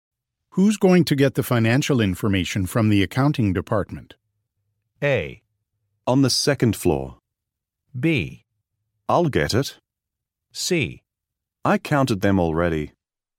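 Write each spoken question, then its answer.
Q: Who's going to get the financial information from the accounting department?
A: B: I'll get it.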